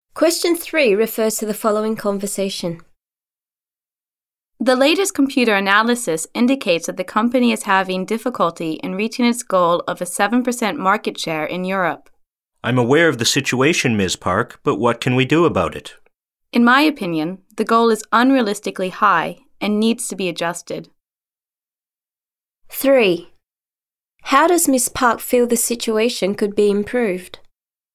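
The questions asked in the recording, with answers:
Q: How does Ms. Park feel the situation could be improved?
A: By adjusting (lowering) the unrealistically high market-share goal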